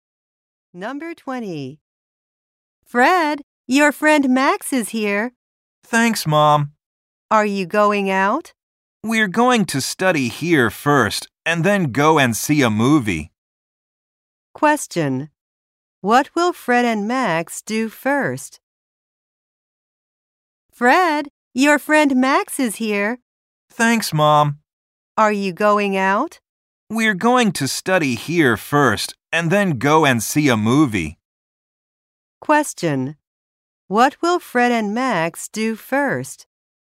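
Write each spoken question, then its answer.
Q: What will Fred and Max do first?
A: Study.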